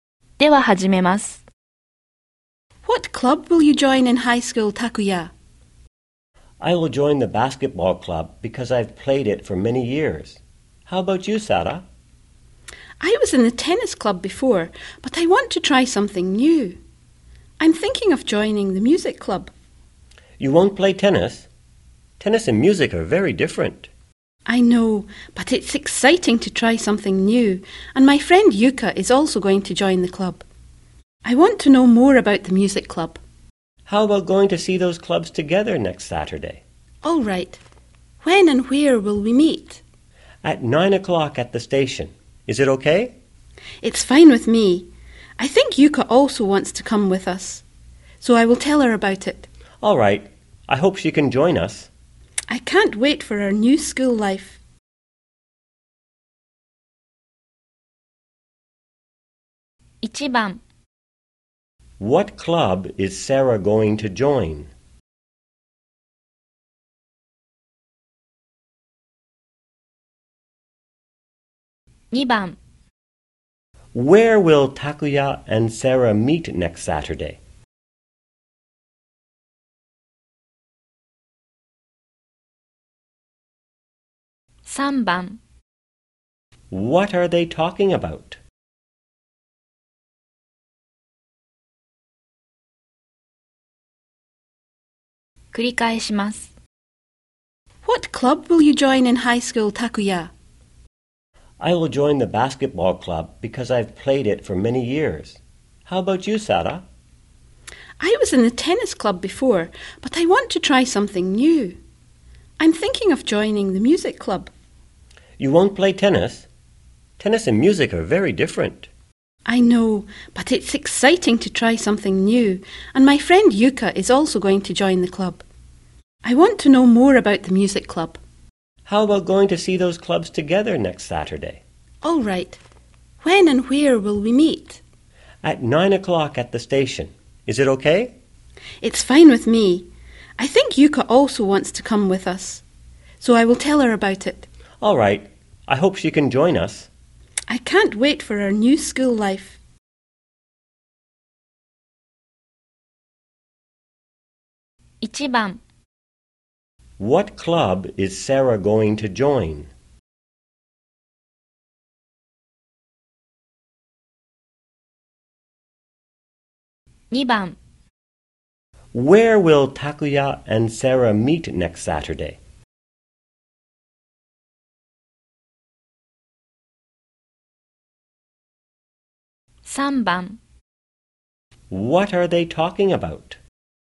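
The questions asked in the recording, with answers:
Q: What club is Sara going to join?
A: The music club

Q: Where will Takuya and Sara meet next Saturday?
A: At the station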